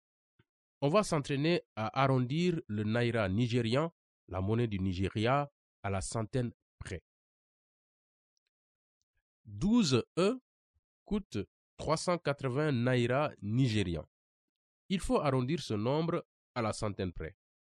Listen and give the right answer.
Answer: La réponse est 400 naira.